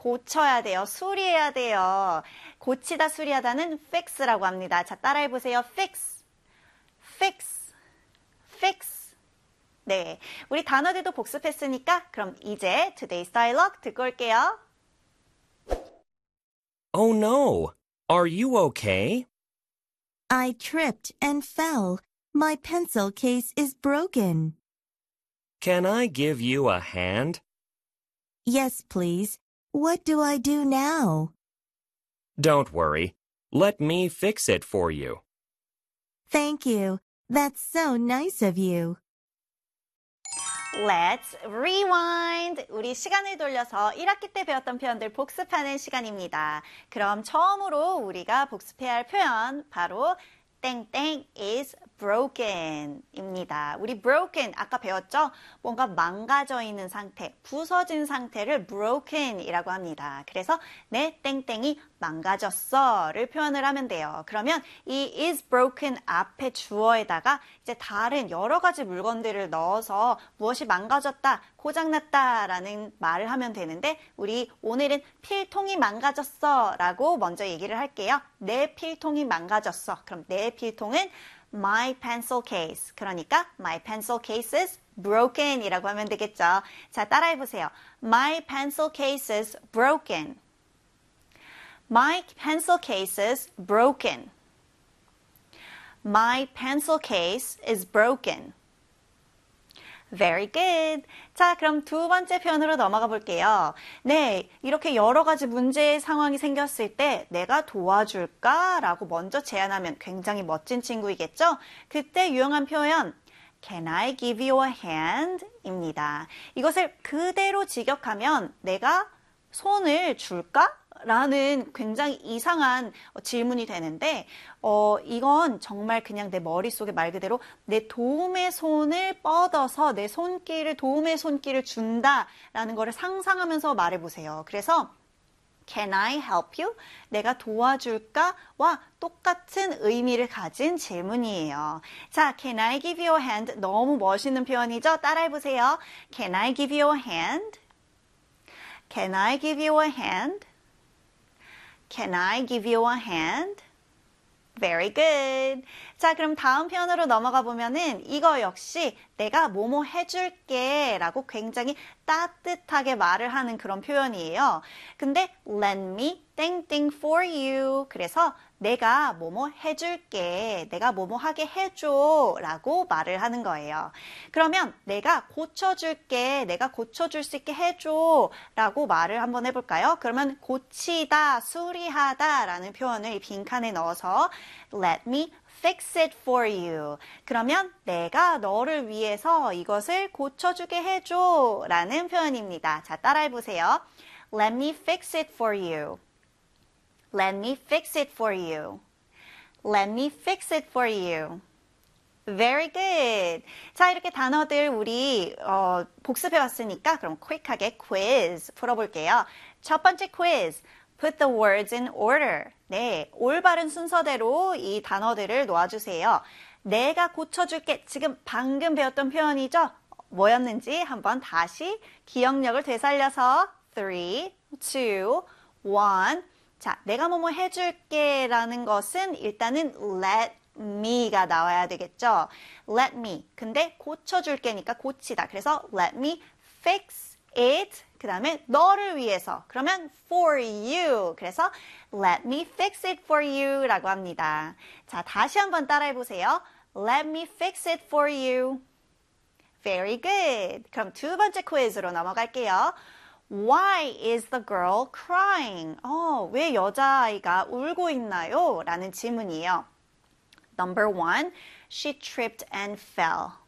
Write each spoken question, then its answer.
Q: Why is the girl crying?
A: Number 1입니다.